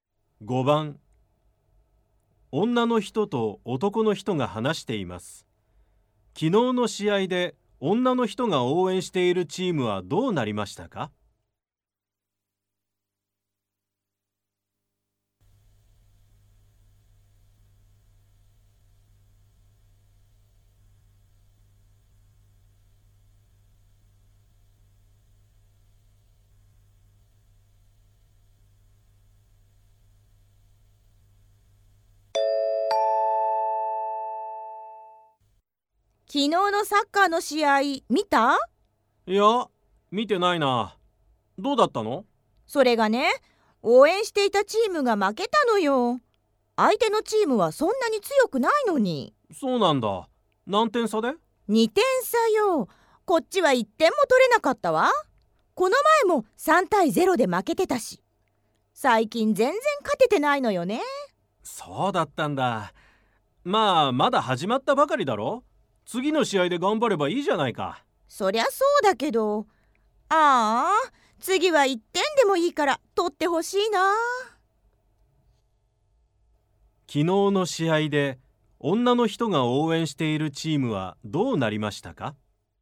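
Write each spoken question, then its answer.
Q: 昨日の試合で女の人が応援しているチームはどうなりましたか?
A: 0対2で負けた(1点も取れなかった)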